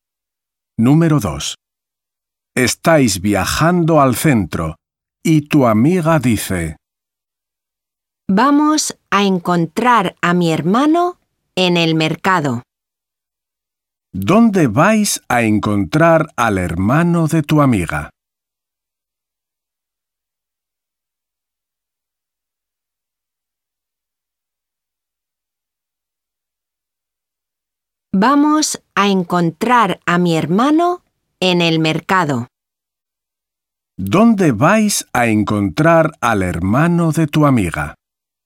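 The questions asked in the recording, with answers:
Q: ¿Dónde vais a encontrar al hermano de tu amiga?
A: en el mercado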